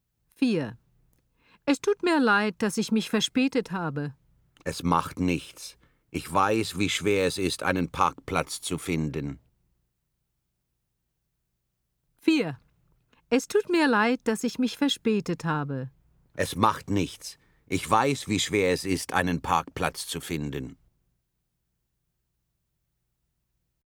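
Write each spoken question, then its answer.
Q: Es tut mir leid, dass ich mich verspätet habe.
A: L: logisch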